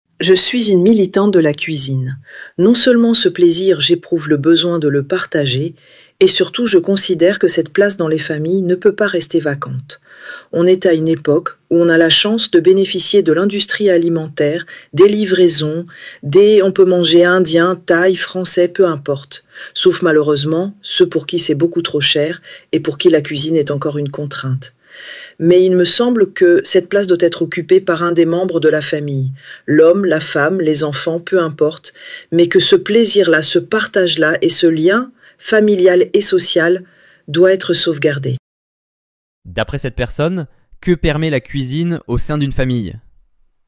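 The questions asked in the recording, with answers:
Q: D'après cette personne, que permet la cuisine au sein d'une famille ?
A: Le partage, le plaisir et la préservation du lien familial et social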